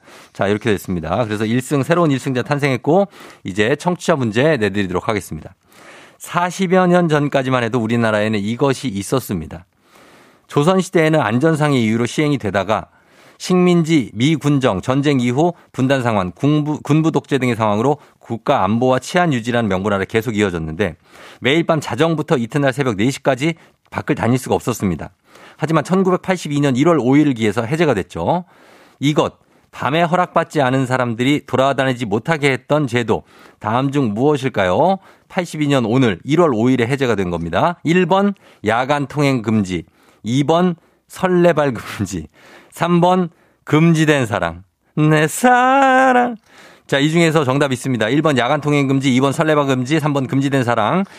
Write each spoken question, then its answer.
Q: 이것, 밤에 허락받지 않은 사람들이 돌아다니지 못하게 했던 제도, 다음 중 무엇일까요?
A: 정답은 바로 두구두구두구두구두구두구두구두구 야간 통행 금지죠.